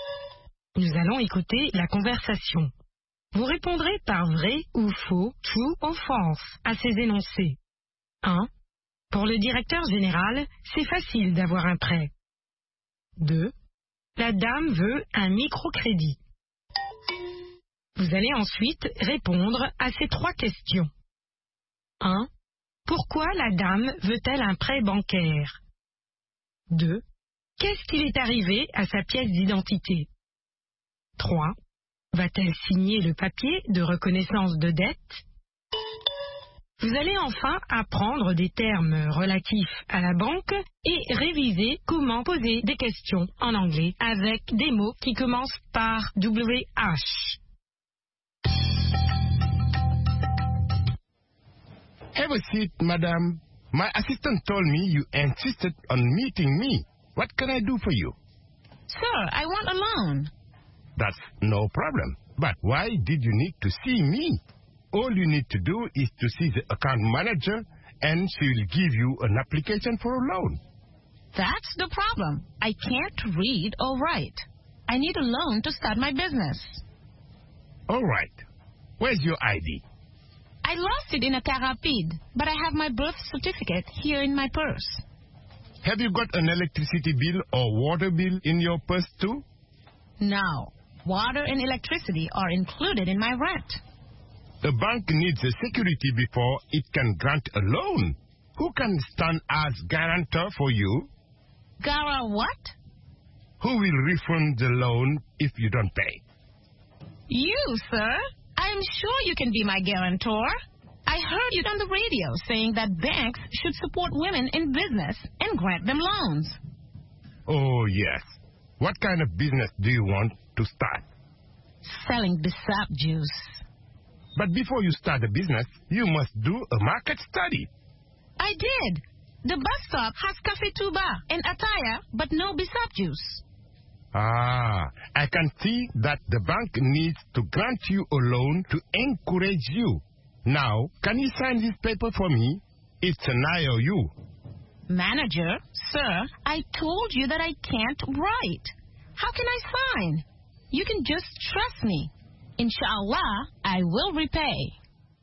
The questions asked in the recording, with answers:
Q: Pour le directeur général, c'est facile d'avoir un prêt.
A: L'énoncé 1 est vrai.

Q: La dame veut un microcrédit.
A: L'énoncé 2 est faux.

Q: Pourquoi la dame veut-elle un prêt bancaire?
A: Pour commencer son propre commerce.

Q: Qu'est-ce qui est arrivé à sa pièce d'identité?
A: Elle l'a perdue.

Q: Va-t-elle signer le papier de reconnaissance de dette?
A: Non.